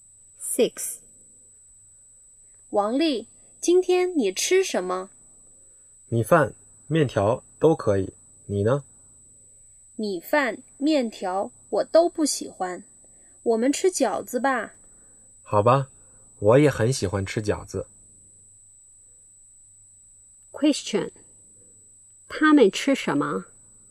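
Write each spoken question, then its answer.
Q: 他们吃什么?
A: 饺子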